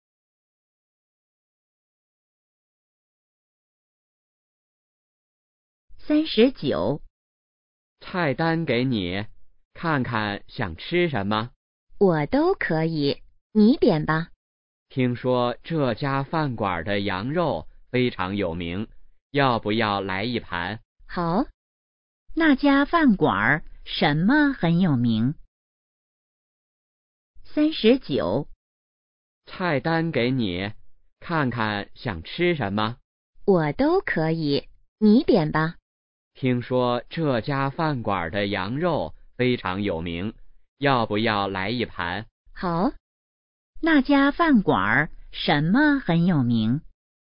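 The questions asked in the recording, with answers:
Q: 那家饭馆什么很有名?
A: 羊肉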